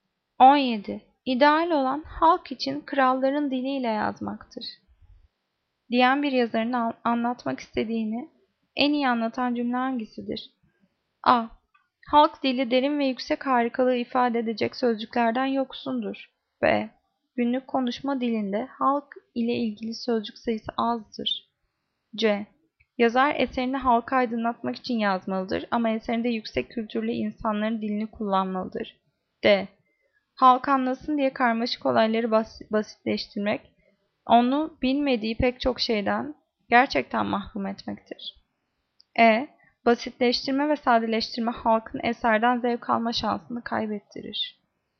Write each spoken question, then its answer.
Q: Diyen bir yazarın anlatmak istediğini en iyi anlatan cümle hangisidir?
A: Cevap C. Yazar eserini halka aydınlatmak için yazmalı ama eserinde yüksek kültürlü insanların dilini kullanmalıdır.